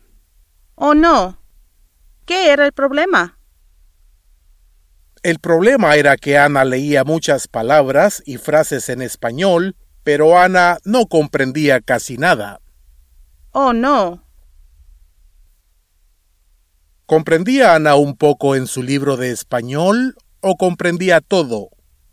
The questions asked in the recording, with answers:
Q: ¿Comprendía Ana un poco en su libro de español o comprendía todo?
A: Ana comprendía un poco.